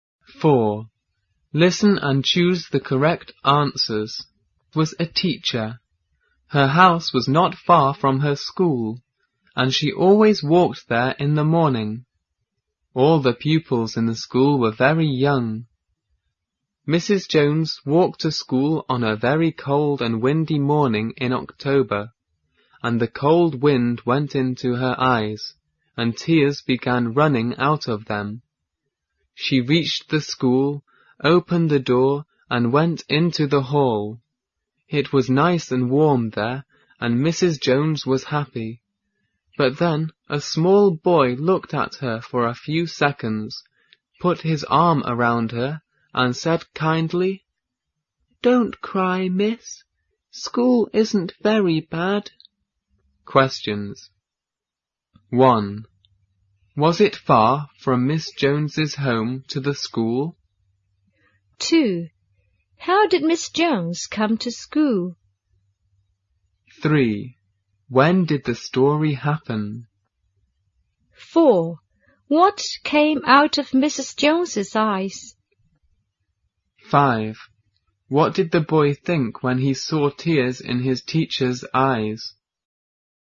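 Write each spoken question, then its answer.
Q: Was it far from Miss Jones's home to the school?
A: No, it wasn't.

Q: How did Miss Jones come to school?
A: She walked.

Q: When did the story happen?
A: On a cold and windy morning in October.

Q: What came out of Mrs. Jones's eyes?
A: Tears.

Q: What did the boy think when he saw tears in his teacher's eyes?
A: He thought she was crying because she didn't want to come to school.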